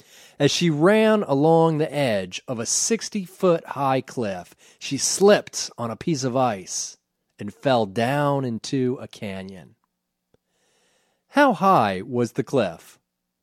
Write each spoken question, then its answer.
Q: How high was the cliff?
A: The cliff was 60 feet high.